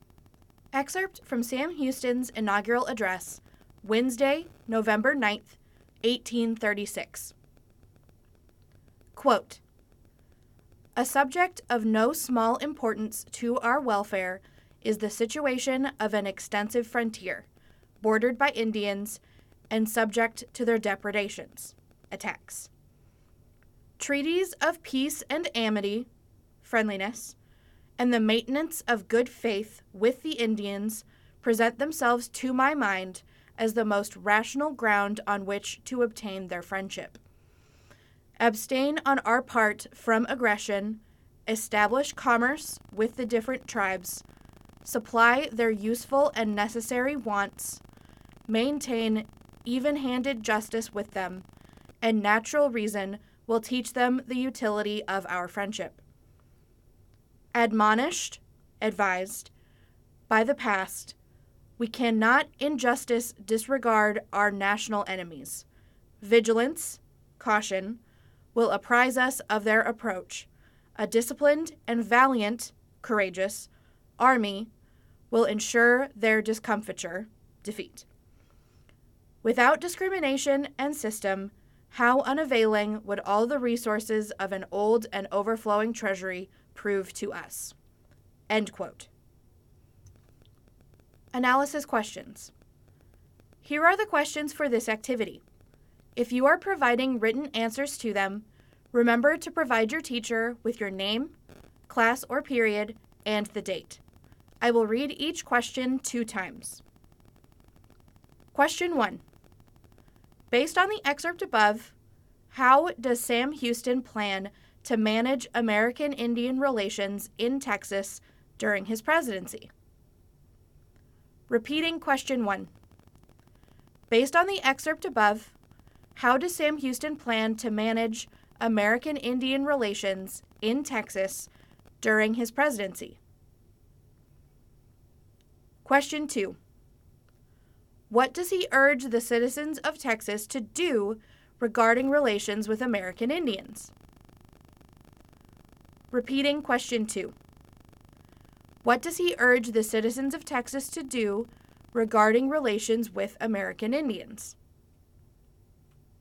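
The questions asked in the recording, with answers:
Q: Based on the excerpt above, how does Sam Houston plan to manage American Indian relations in Texas during his presidency?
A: Through peace treaties and friendship, good faith, trade with the tribes, providing for their needs, and even-handed justice

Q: What does he urge the citizens of Texas to do regarding relations with American Indians?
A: Not to attack them, to trade with them and treat them fairly, while staying watchful and careful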